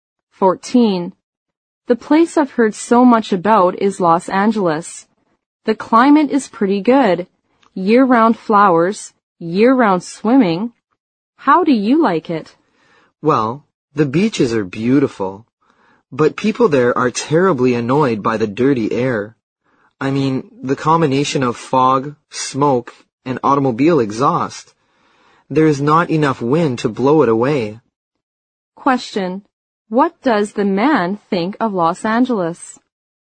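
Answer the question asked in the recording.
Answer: The beaches are beautiful, but the air is dirty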